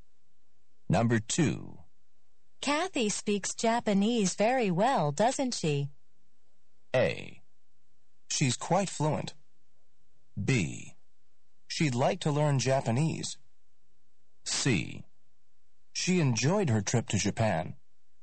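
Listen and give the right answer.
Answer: A: She's quite fluent.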